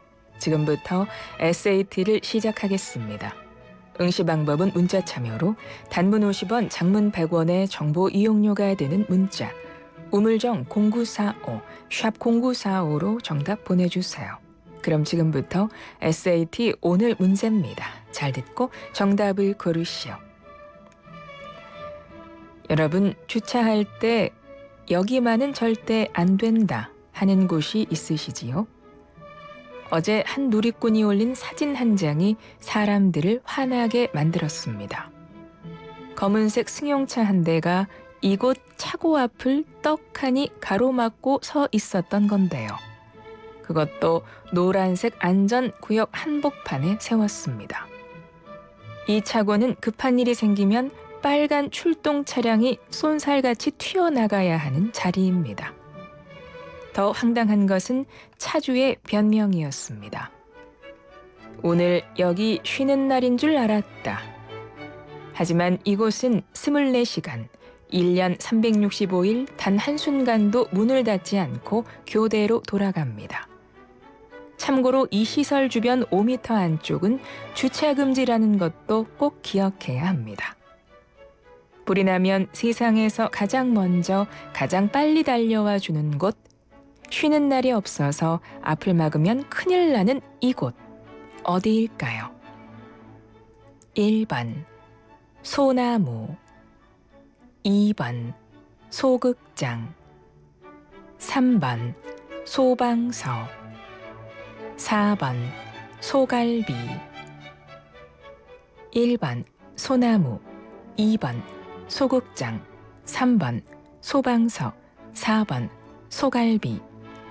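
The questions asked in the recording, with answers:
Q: 불이 나면 세상에서 가장 먼저 가장 빨리 달려와 주는 곳, 쉬는 날이 없어서 앞을 막으면 큰일 나는 이곳, 어디일까요?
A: 3: 소방서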